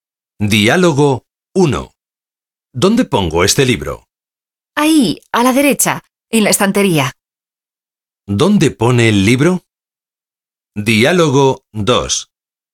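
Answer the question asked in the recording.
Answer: En la estantería, a la derecha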